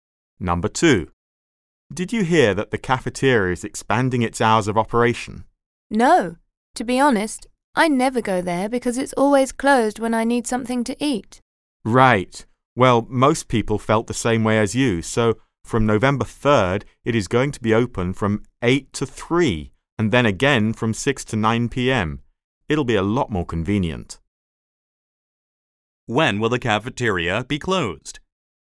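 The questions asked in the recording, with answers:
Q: When will the cafeteria be closed?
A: From 3 to 6 p.m. (and from 9 p.m. to 8 a.m.)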